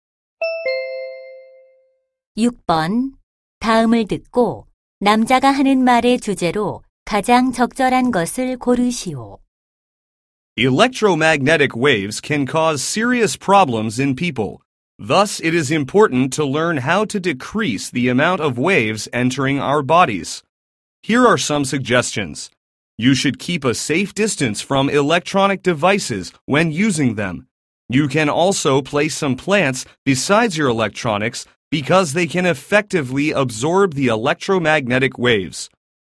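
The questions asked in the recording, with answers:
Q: 다음을 듣고 남자가 하는 말의 주제로 가장 적절한 것을 고르시오.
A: 전자파 노출을 줄이는 방법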